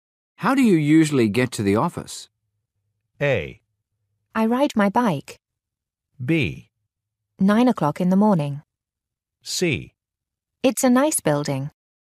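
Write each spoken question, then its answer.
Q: How do you usually get to the office?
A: A: I ride my bike.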